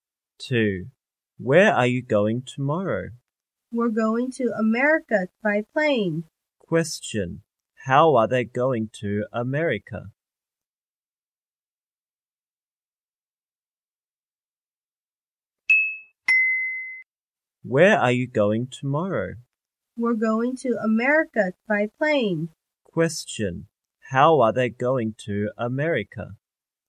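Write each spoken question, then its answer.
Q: How are they going to America?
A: By plane.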